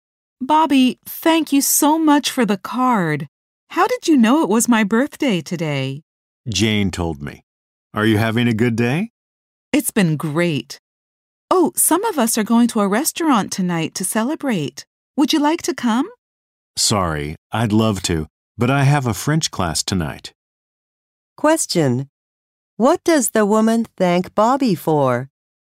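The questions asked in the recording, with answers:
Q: What does the woman thank Bobby for?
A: The birthday card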